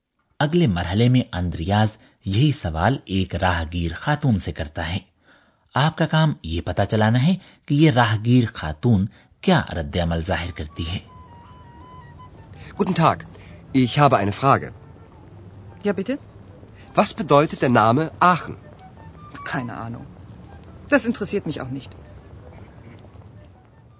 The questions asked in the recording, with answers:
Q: آپ کا کام یہ پتا چلانا ہے کہ یہ راہگیر خاتون کیا رد عمل ظاہر کرتی ہے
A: راہگیر خاتون کہتی ہے کہ اسے کوئی پتہ نہیں ہے